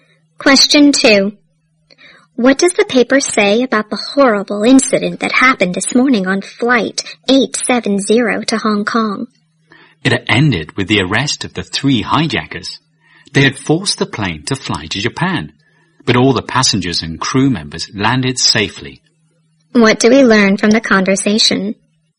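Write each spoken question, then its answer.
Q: What do we learn from the conversation?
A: The hijackers were arrested and everyone on the plane landed safely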